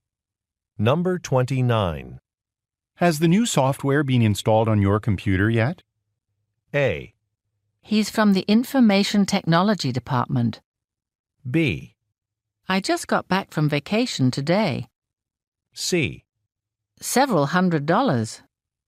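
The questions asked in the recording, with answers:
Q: Has the new software been installed on your computer yet?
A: B: I just got back from vacation today.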